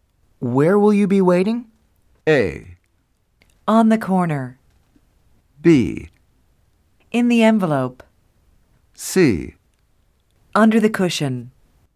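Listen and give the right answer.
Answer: A: On the corner.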